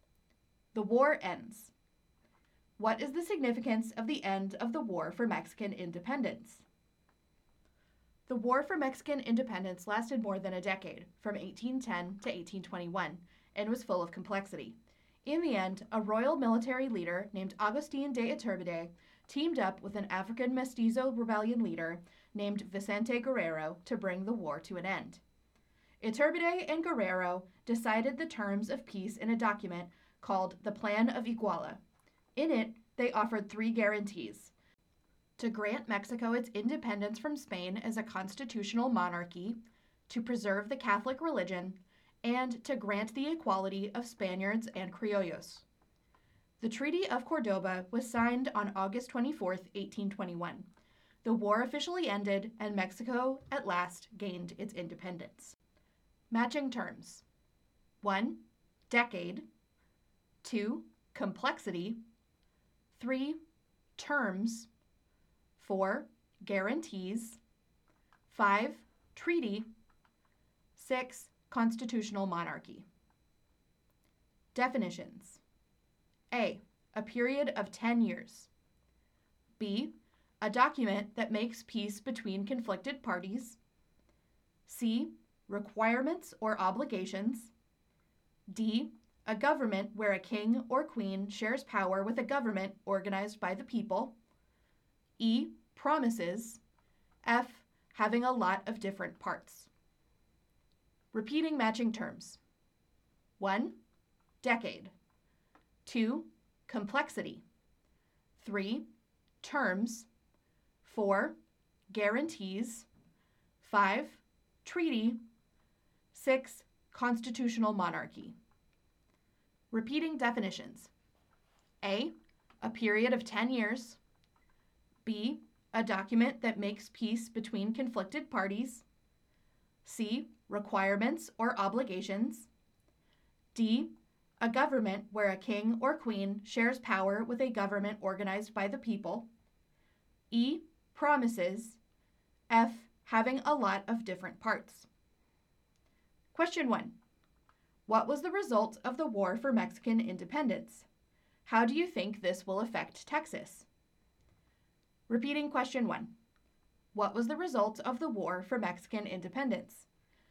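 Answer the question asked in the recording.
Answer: Mexico gained its independence from Spain under the Treaty of Cordoba in 1821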